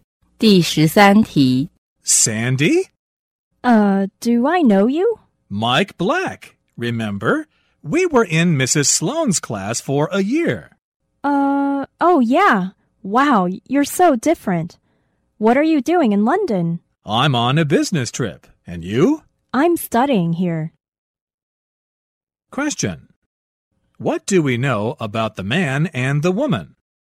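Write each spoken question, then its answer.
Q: What do we know about the man and the woman?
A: They were classmates in Mrs. Sloan's class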